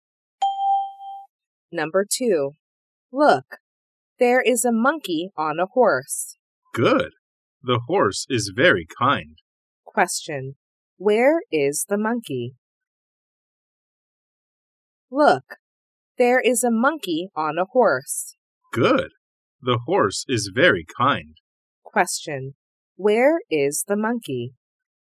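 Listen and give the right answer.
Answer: On a horse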